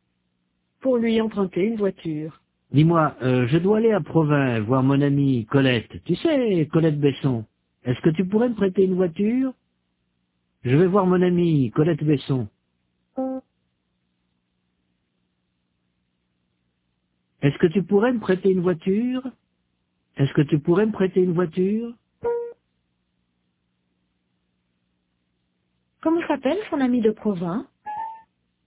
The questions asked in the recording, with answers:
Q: Comment s'appelle son amie de Provins?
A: Colette Besson.